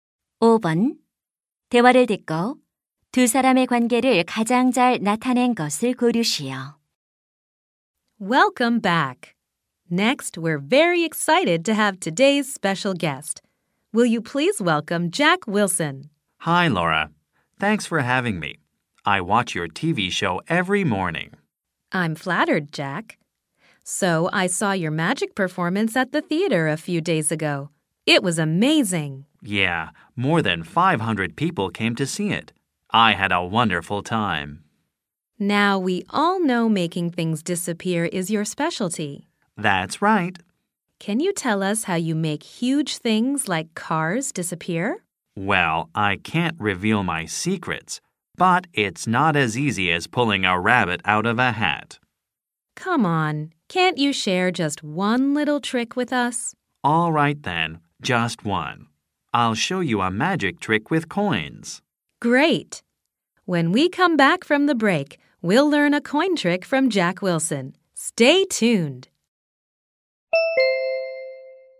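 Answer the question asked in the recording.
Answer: TV 쇼 진행자 - 마술사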